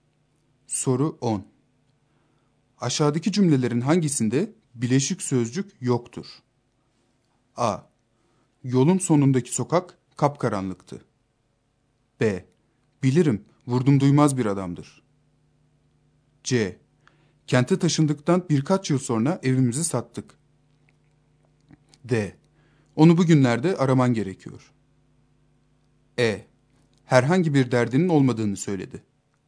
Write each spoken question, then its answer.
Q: Aşağıdaki cümlelerin hangisinde bileşik sözcük yoktur?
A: Doğru yanıt A şıkkı.